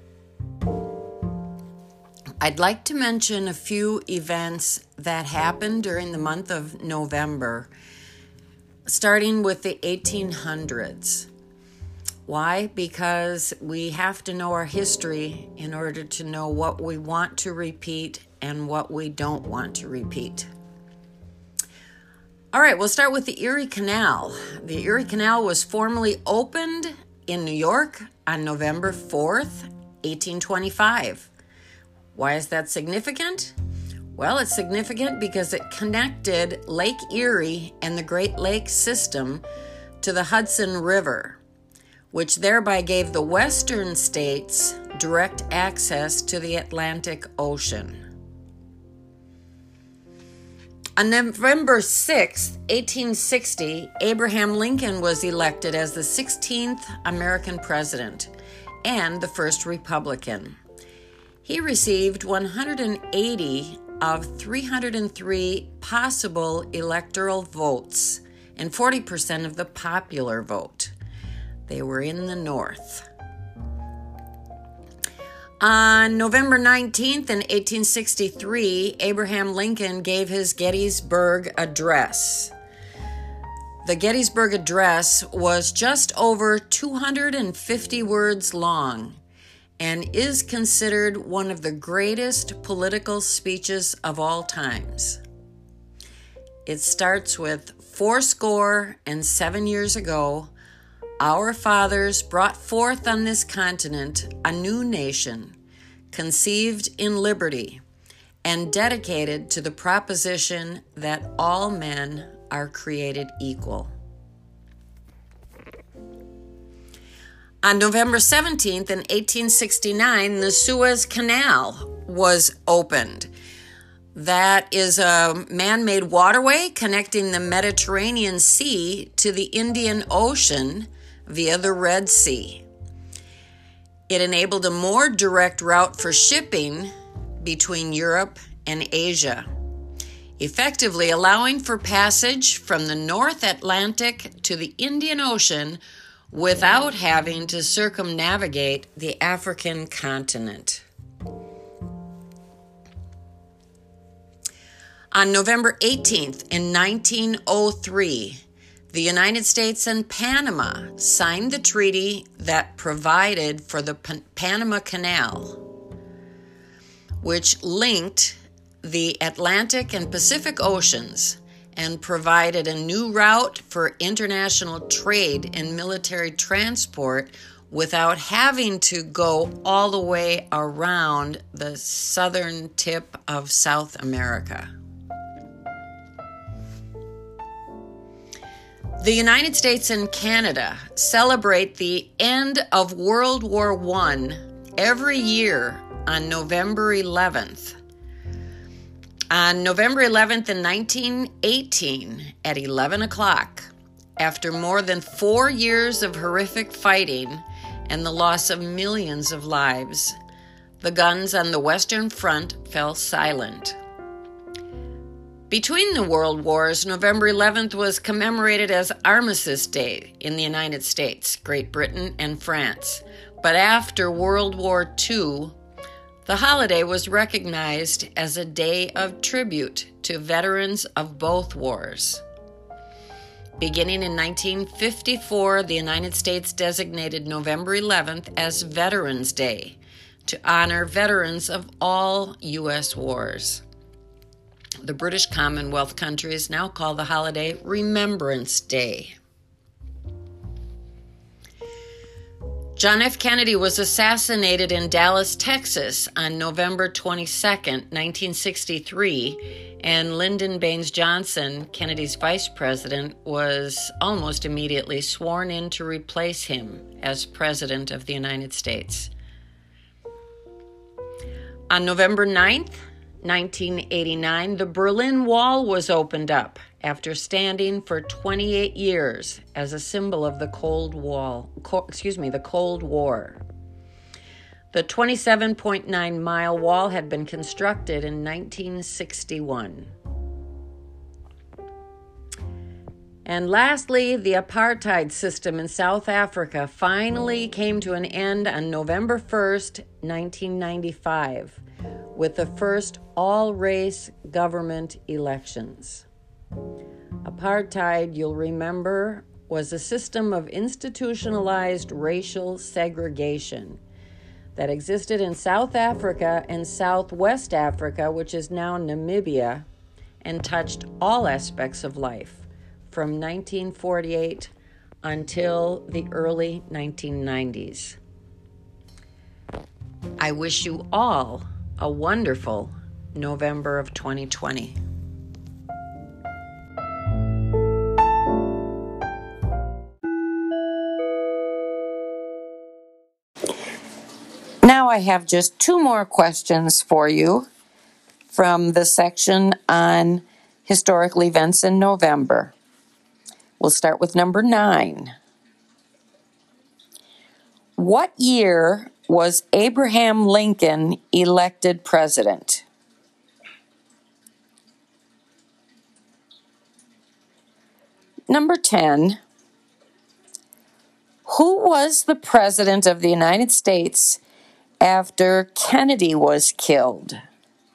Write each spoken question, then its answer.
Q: What year was Abraham Lincoln elected president?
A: Number 9, Lincoln was elected in 1860.

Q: Who was the president of the United States after Kennedy was killed?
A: And number 10, Lyndon Baines Johnson became president when John F.